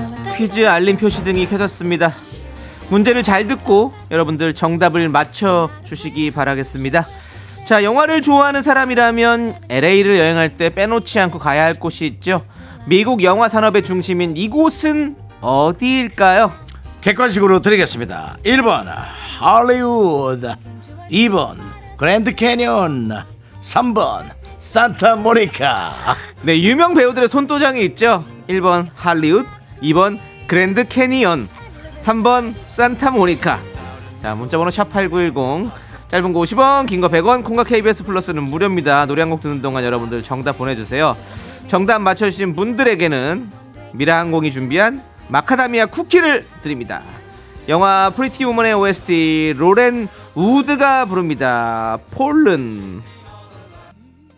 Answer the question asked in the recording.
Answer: LA로 향하는 기장 퀴즈 첫 번째 문제 정답은 1번 할리우드입니다.